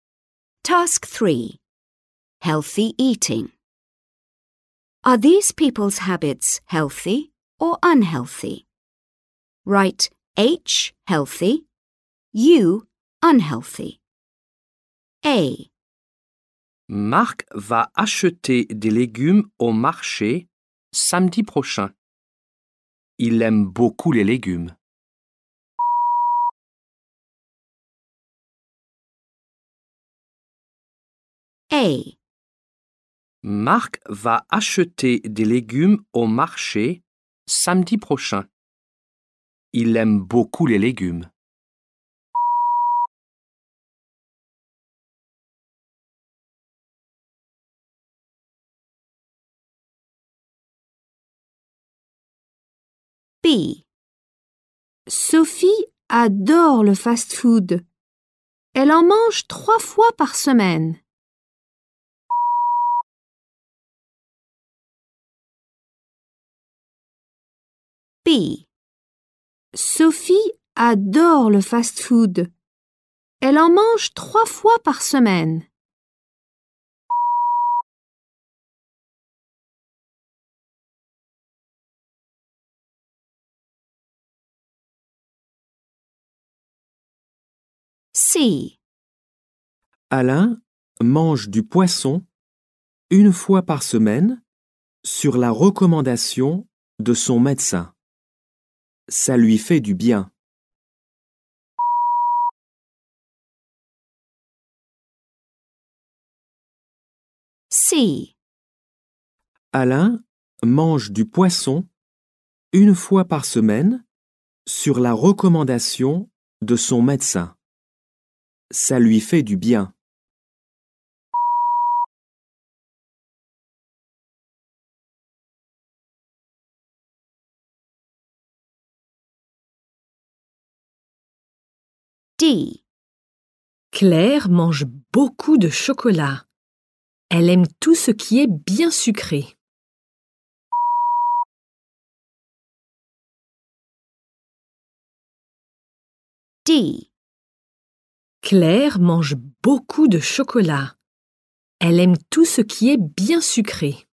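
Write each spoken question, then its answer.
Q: Are these people's habits healthy or unhealthy?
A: H: healthy

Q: Are these people's habits healthy or unhealthy?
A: U: unhealthy

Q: Are these people's habits healthy or unhealthy?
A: H: healthy

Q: Are these people's habits healthy or unhealthy?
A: U: unhealthy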